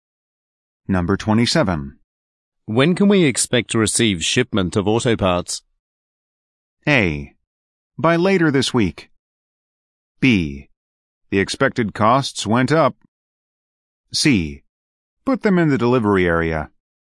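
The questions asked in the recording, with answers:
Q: When can we expect to receive shipment of auto parts?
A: A: By later this week.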